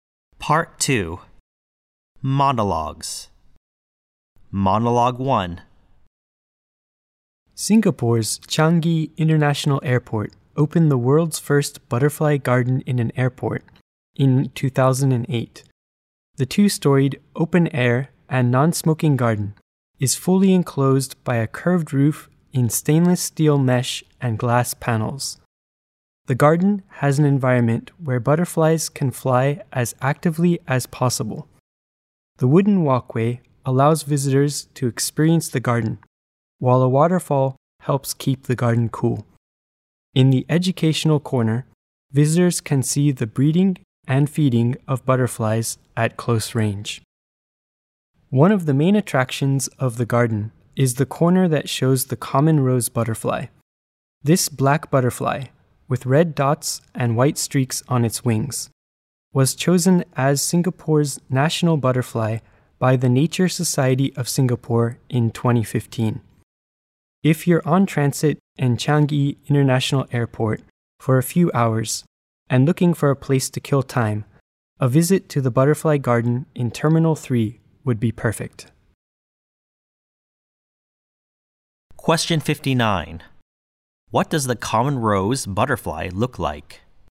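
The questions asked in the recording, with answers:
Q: What does the common rose butterfly look like?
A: Black, with red dots and white streaks on its wings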